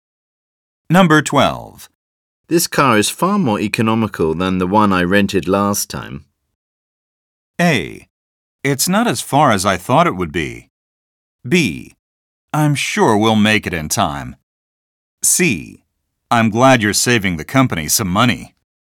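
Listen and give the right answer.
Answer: C: I'm glad you're saving the company some money.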